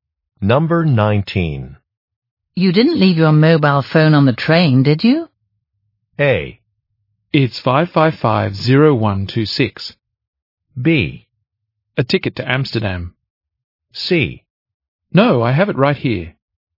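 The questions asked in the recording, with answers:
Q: You didn't leave your mobile phone on the train, did you?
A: C: No, I have it right here.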